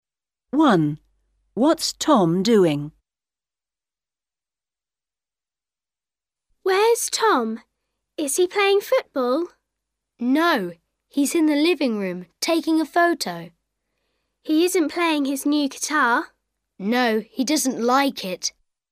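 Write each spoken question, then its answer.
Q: What's Tom doing?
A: Taking a photo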